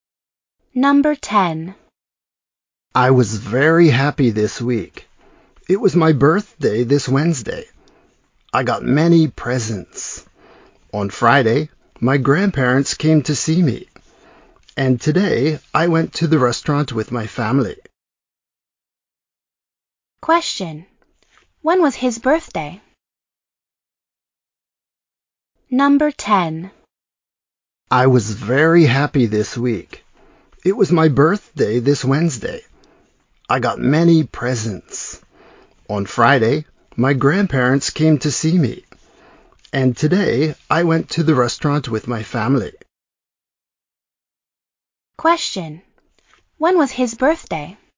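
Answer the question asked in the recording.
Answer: This Wednesday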